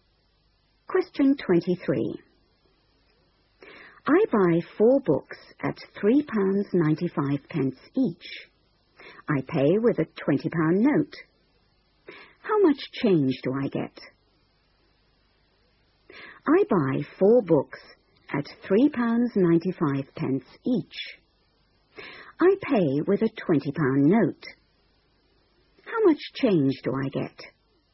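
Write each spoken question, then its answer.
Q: I pay with a £20 note. How much change do I get?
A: £4.20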